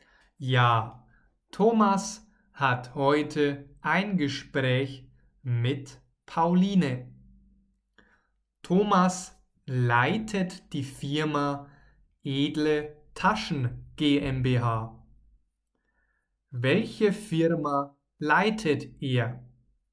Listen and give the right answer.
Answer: die Firma Edle Taschen GmbH.